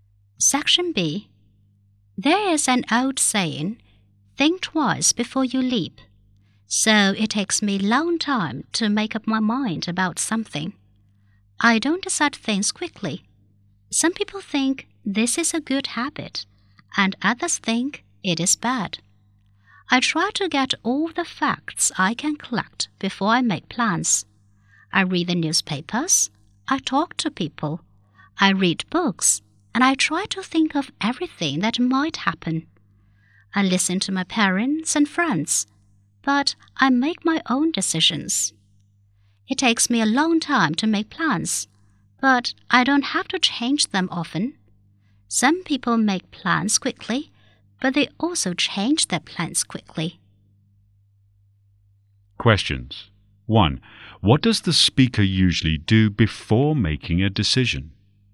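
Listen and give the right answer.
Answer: Collects all the facts: reads newspapers and books, talks to people, and thinks of everything that might happen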